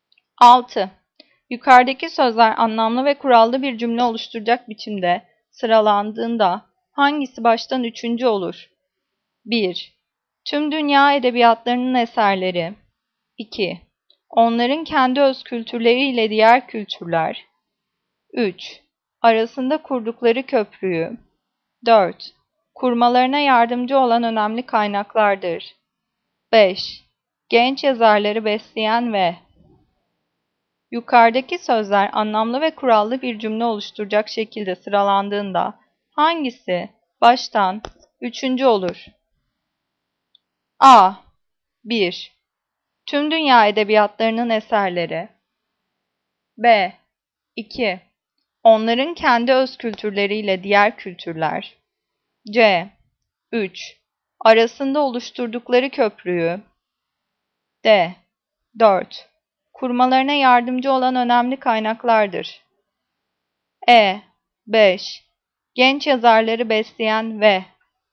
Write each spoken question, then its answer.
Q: Yukarıdaki sözler anlamlı ve kurallı bir cümle oluşturacak biçimde sıralandığında hangisi baştan üçüncü olur?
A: Cevap B. 2. Onların kendi öz kültürleriyle diğer kültürler.